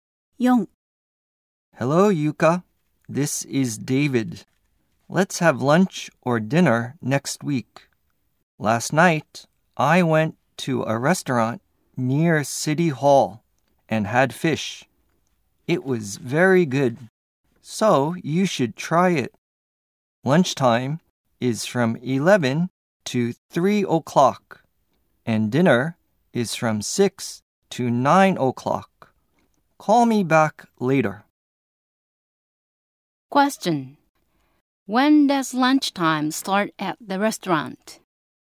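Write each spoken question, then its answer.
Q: Question: When does lunchtime start at the restaurant?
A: At 11 o'clock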